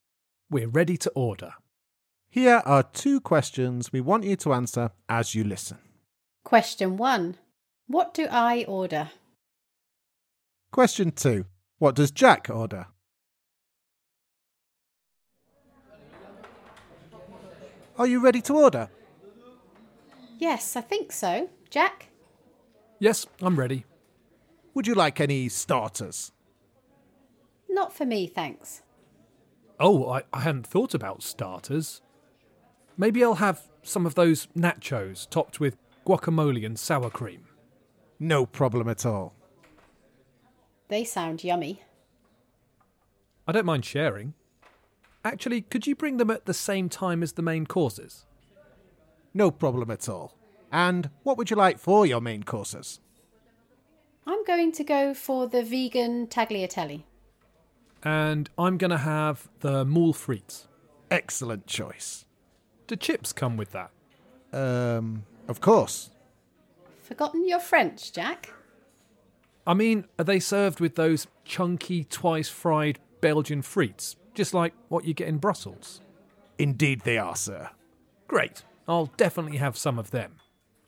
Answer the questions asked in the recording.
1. I ordered the vegan tagliatelle
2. I ordered nachos with guacamole and sour cream, followed by moule frites, which is mussels and chips.